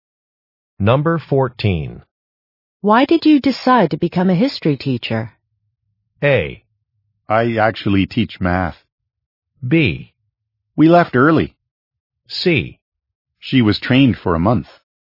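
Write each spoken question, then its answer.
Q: Why did you decide to become a history teacher?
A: A: I actually teach math.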